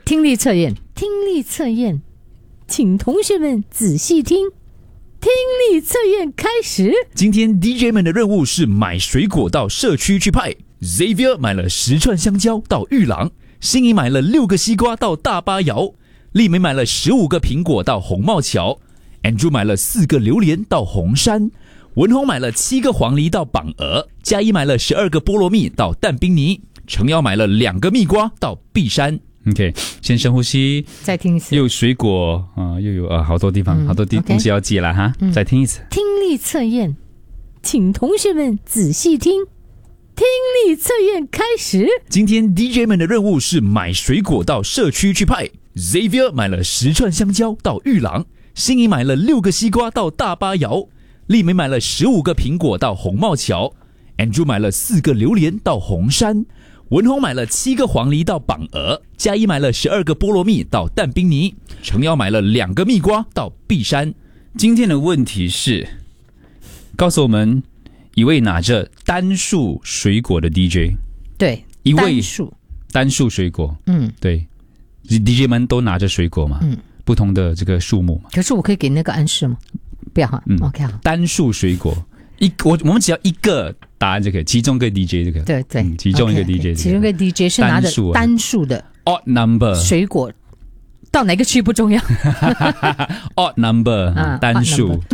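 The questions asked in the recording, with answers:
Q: 今天的问题是,告诉我们一位拿着单数水果的 DJ,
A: 丽梅(15个苹果)或文宏(7个黄梨)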